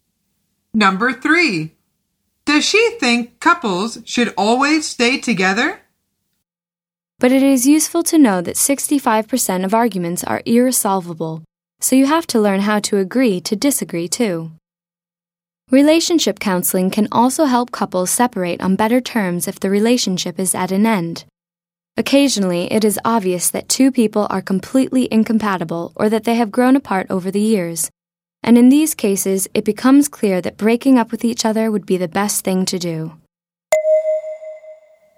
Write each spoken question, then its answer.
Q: Does she think couples should always stay together?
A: The answer is no. Sometimes it is better for them to break up.